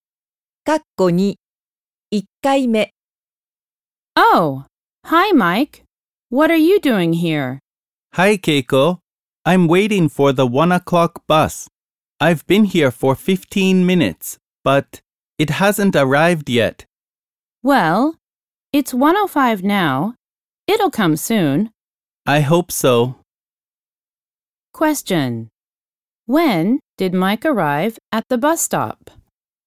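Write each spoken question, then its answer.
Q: When did Mike arrive at the bus stop?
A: At 12:50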